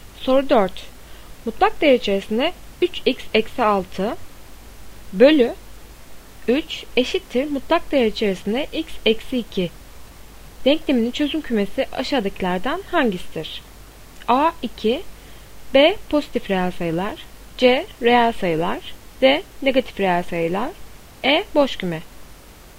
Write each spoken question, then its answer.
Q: Denkleminin çözüm kümesi aşağıdakilerden hangisidir?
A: Doğru cevap C reel sayılar.